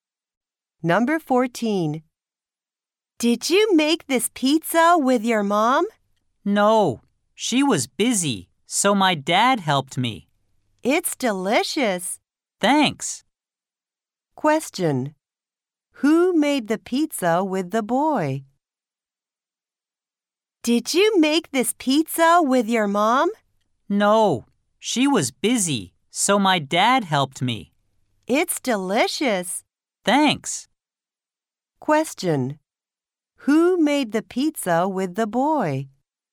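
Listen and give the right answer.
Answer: His dad.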